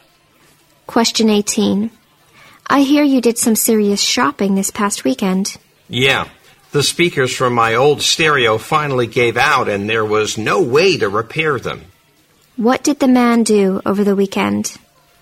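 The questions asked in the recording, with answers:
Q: What did the man do over the weekend?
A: He went shopping for new stereo speakers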